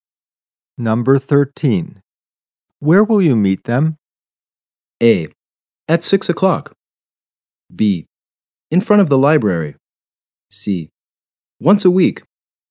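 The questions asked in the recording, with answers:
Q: Where will you meet them?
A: B: In front of the library.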